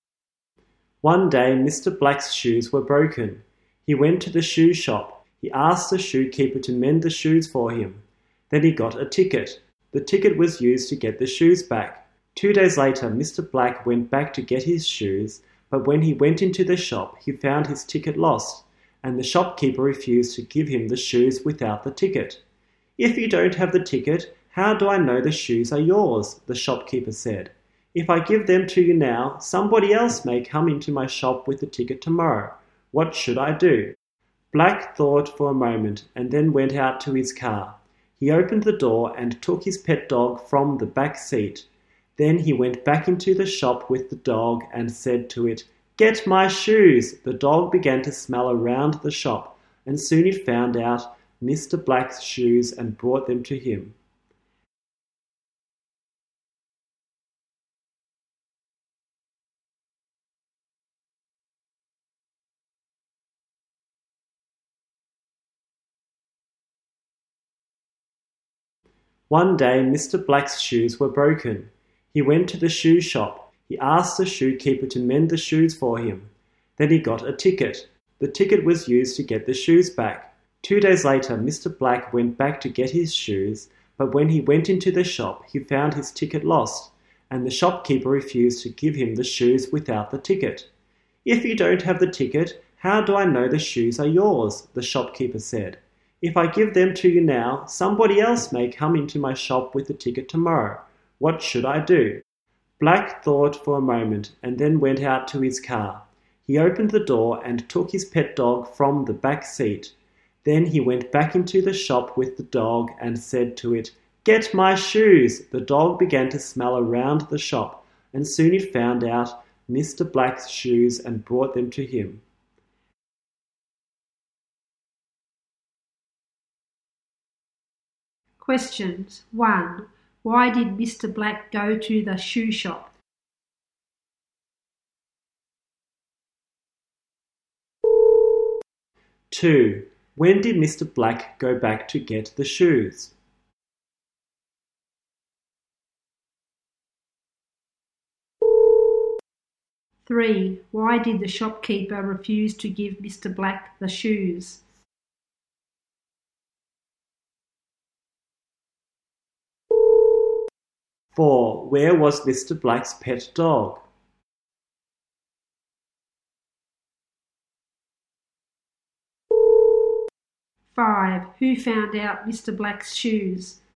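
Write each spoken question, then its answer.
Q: Why did Mr. Black go to the shoe shop?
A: To have his broken shoes mended

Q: When did Mr. Black go back to get the shoes?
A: 2 days later

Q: Why did the shopkeeper refuse to give Mr. Black the shoes?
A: Because he lost his ticket

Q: Where was Mr. Black's pet dog?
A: On the back seat of his car

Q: Who found out Mr. Black's shoes?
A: His pet dog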